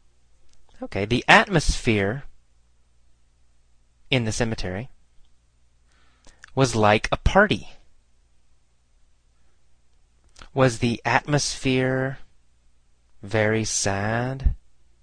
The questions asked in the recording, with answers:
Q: Was the atmosphere Very sad?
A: No, no, the atmosphere was not sad.